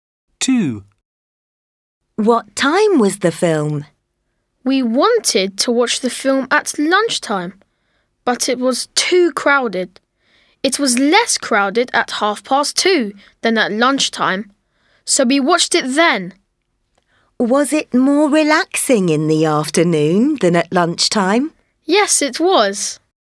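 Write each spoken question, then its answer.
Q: What time was the film?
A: 2:30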